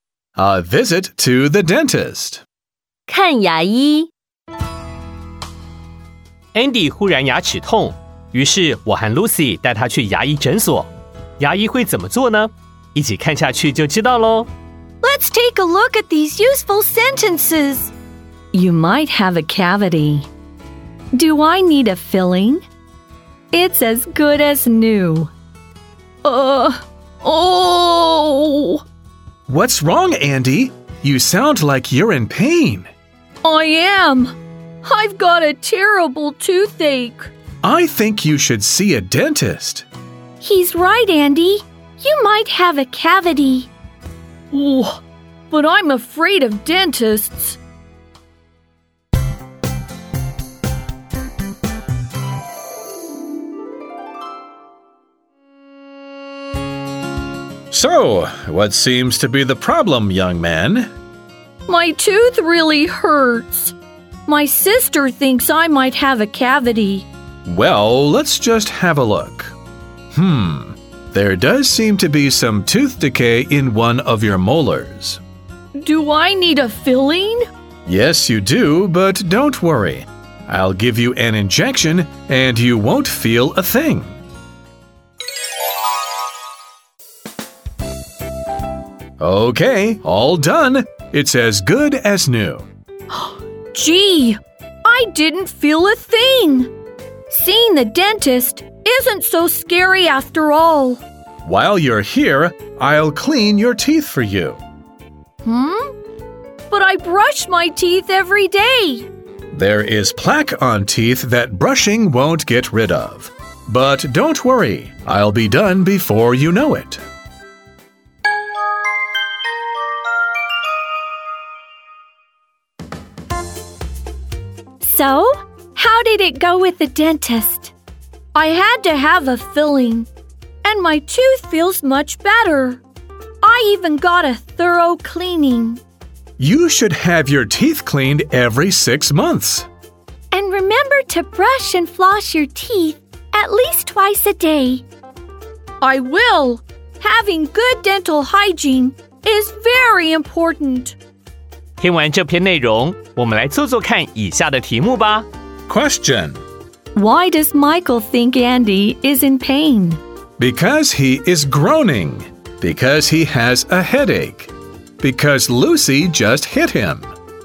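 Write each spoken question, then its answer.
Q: Why does Michael think Andy is in pain?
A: Because he is groaning.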